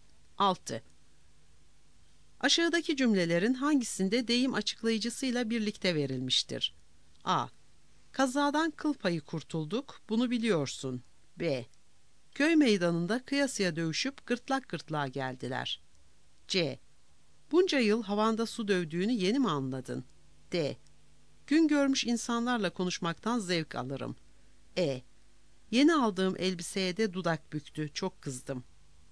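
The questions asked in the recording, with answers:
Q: Aşağıdaki cümlelerin hangisinde deyim açıklayıcısıyla birlikte verilmiştir?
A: B: Köy meydanında kıyasıya dövüşüp gırtlak gırtlağa geldiler.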